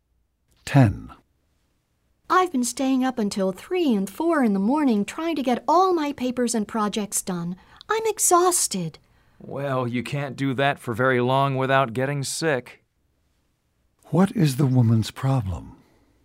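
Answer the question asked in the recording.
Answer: She is exhausted from staying up late doing papers and projects.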